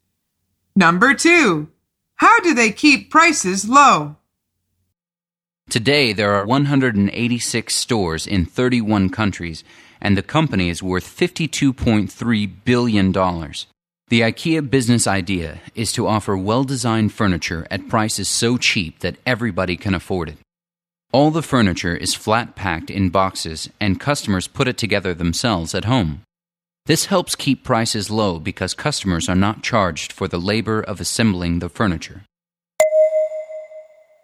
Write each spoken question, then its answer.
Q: How do they keep prices low?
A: by not charging for the labor of assembling the furniture.